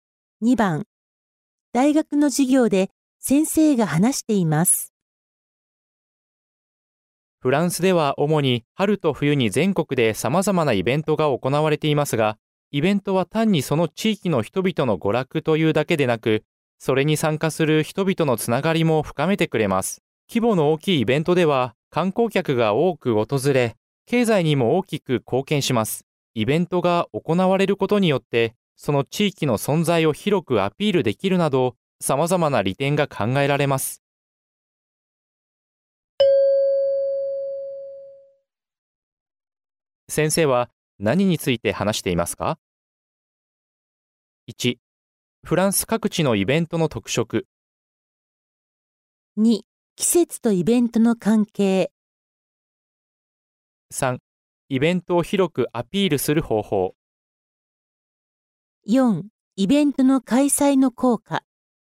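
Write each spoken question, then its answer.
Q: 先生は何について話していますか?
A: 4: イベントの開催の効果。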